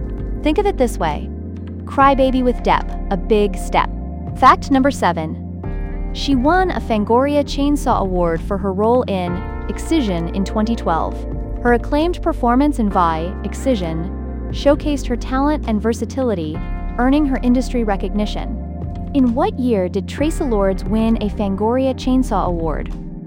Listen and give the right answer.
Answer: Correct answer, 2012.